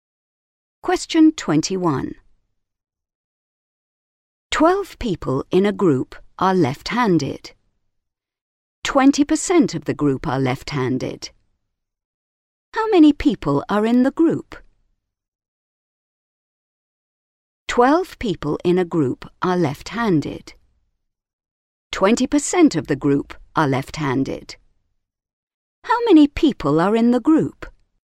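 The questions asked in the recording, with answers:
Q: How many people are in the group?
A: 60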